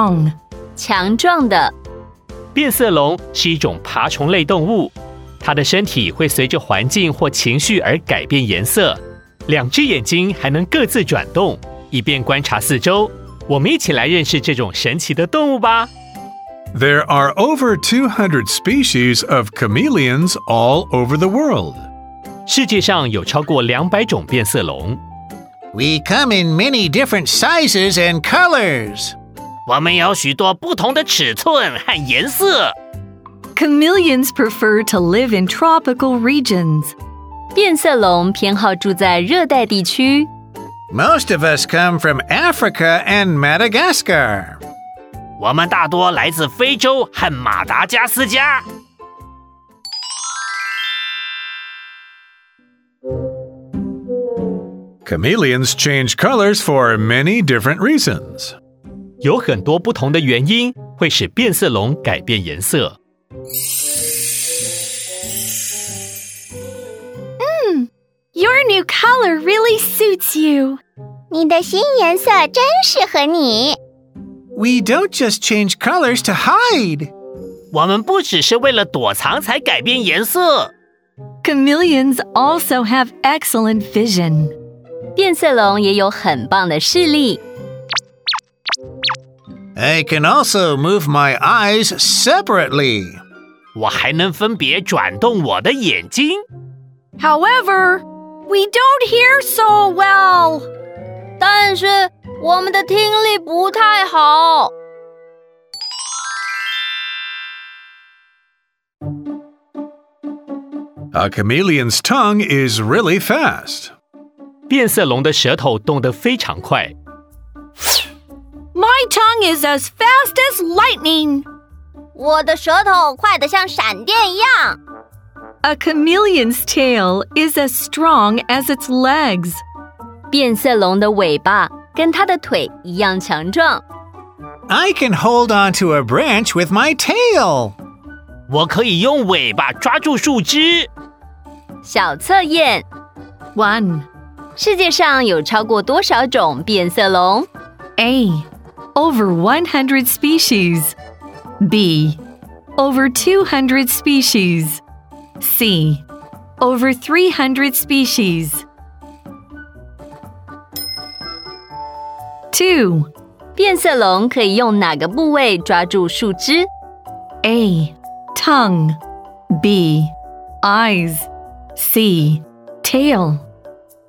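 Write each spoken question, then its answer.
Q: 世界上有超过多少种变色龙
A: B: Over 200 species.

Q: 变色龙可以用哪个部位抓住树枝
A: C: Tail.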